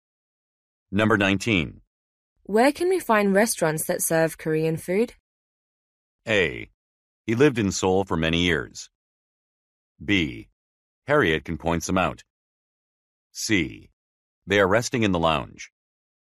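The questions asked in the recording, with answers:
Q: Where can we find restaurants that serve Korean food?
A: B: Harriet can point some out.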